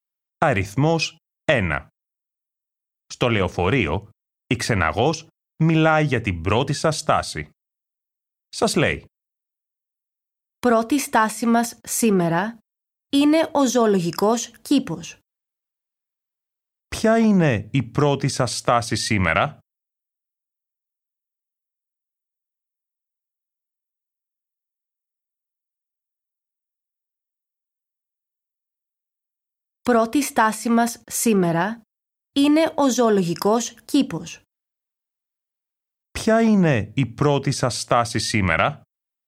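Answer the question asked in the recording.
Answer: ο ζωολογικός κήπος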